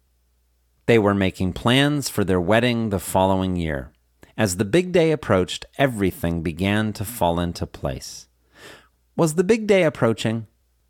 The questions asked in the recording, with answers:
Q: Was the big day approaching?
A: Yes, the big day was approaching.